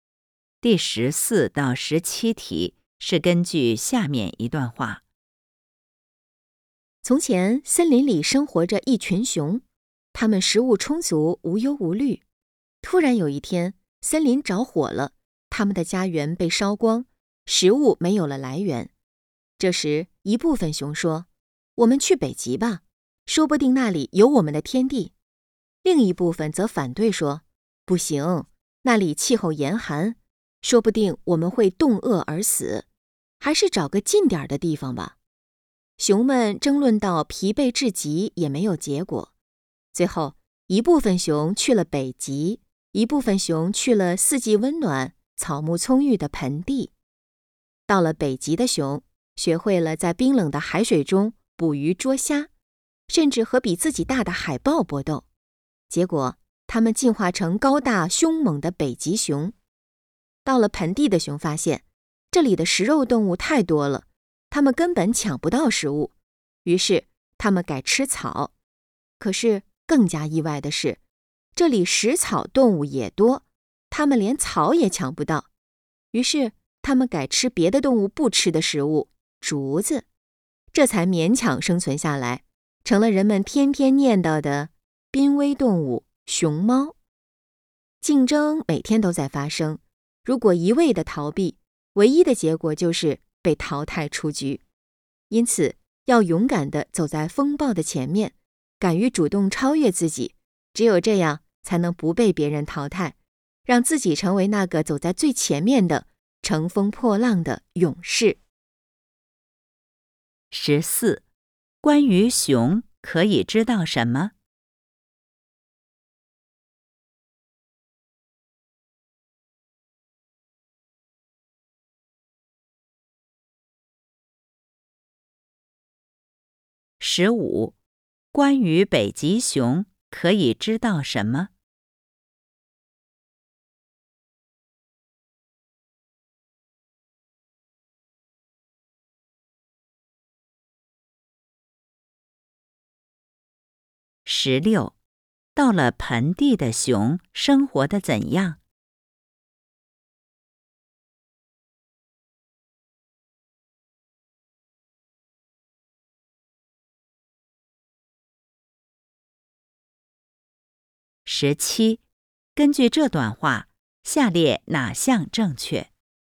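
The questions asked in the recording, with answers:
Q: 到了盆地的熊生活得怎样?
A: 抢不到食物,只能改吃竹子勉强生存,成了濒危动物熊猫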